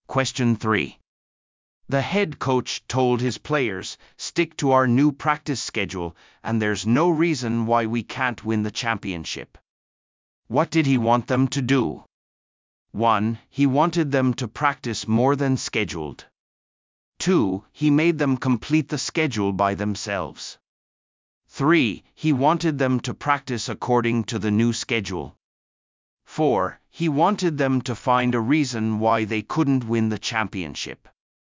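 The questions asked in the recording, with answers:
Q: What did he want them to do?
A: 3: He wanted them to practice according to the new schedule.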